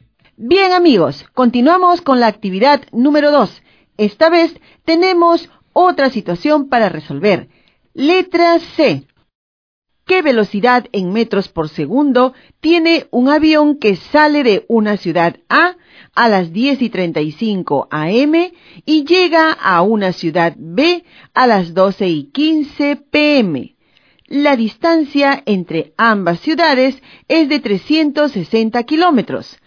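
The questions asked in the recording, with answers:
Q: ¿Qué velocidad en metros por segundo tiene un avión que sale de una ciudad A a las 10:35 a.m. y llega a una ciudad B a las 12:15 p.m.?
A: 60 m/s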